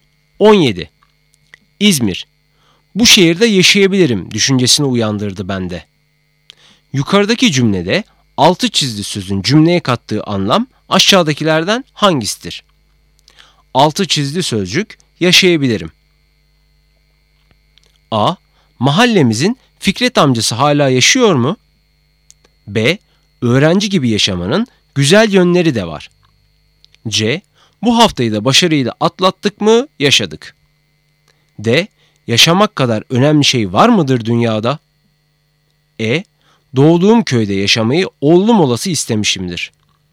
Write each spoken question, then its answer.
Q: Yukarıdaki cümlede altı çizili sözün cümleye kattığı anlam aşağıdakilerden hangisidir?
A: Doğru cevap E. Doğduğum köyde yaşamayı oğlum olası istemişimdir.